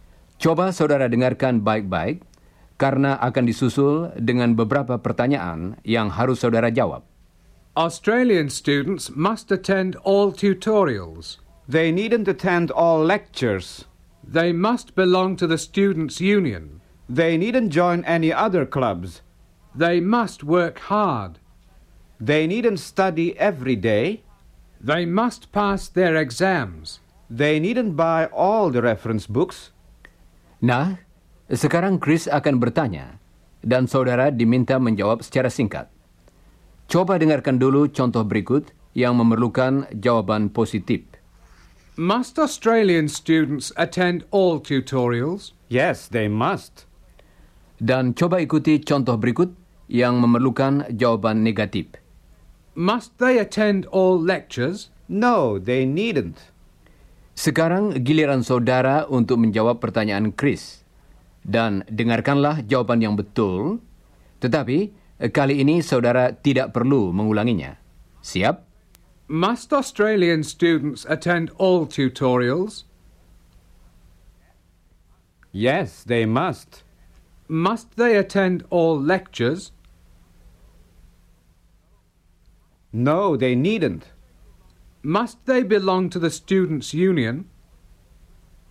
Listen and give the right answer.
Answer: Yes, they must.